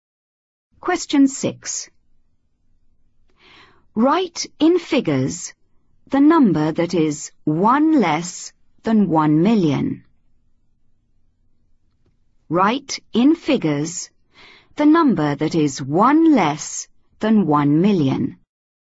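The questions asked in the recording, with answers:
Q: Write in figures the number that is 1 less than 1 million.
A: 999999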